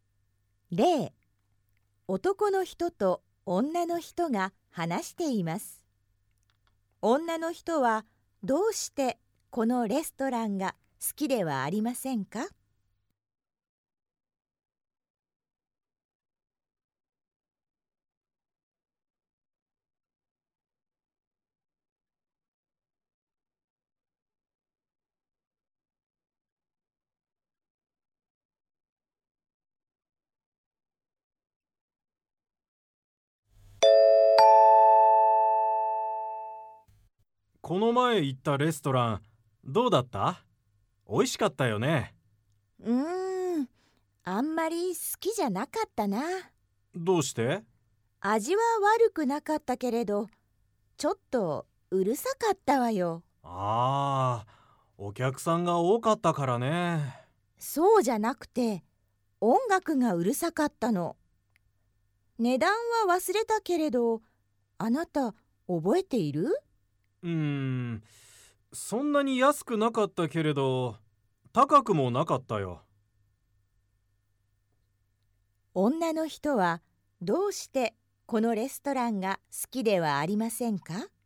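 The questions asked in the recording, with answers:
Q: 女の人はどうしてこのレストランが好きではありませんか?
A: 音楽がうるさかったから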